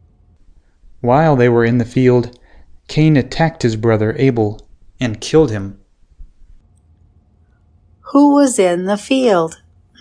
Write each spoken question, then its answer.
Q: Who was in the field?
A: Cain and Abel were in the field.